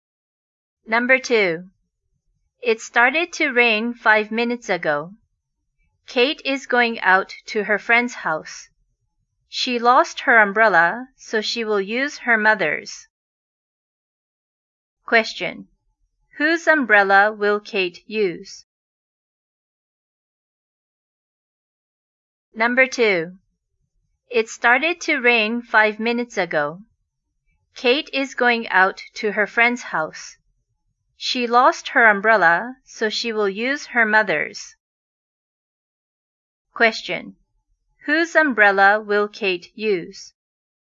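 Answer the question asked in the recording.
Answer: Her mother's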